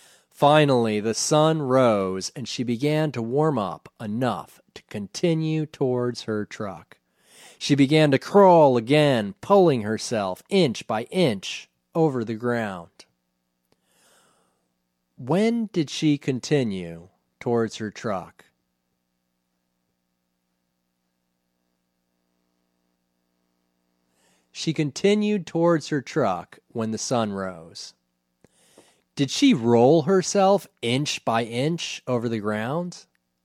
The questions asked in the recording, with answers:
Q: When did she continue towards her truck?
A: She continued towards her truck when the sun rose.

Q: Did she roll herself inch by inch over the ground?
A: No, she didn't roll herself inch by inch over the ground.